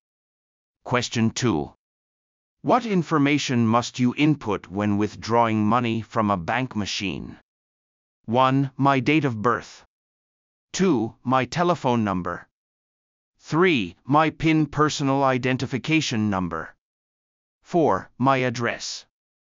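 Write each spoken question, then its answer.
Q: What information must you input when withdrawing money from a bank machine?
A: 3: My PIN personal identification number.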